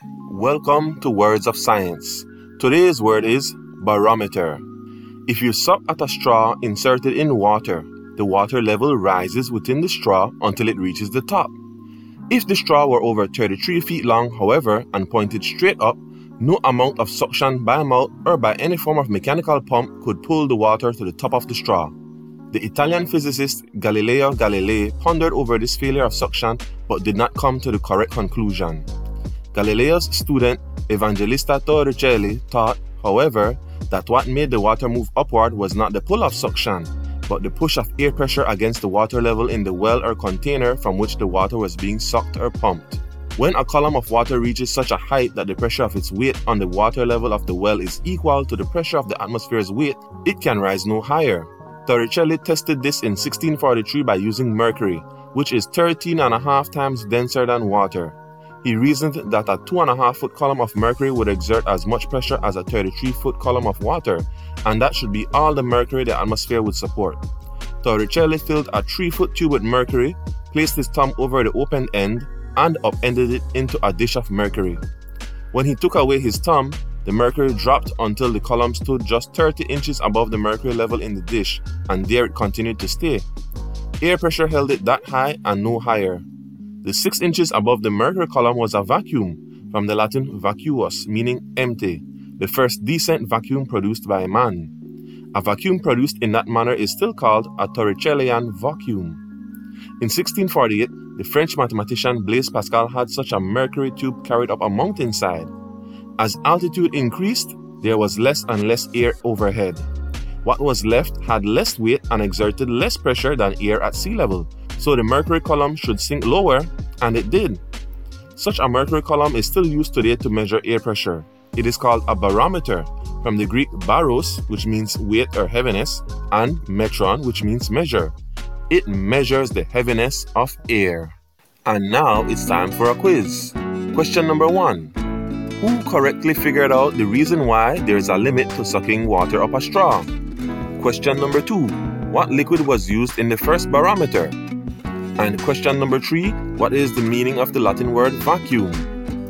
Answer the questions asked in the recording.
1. Evangelista Torricelli
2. mercury
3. empty